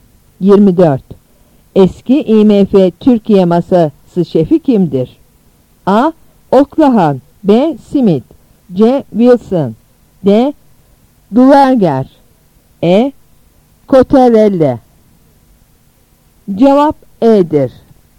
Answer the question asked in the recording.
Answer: Cevap E'dir.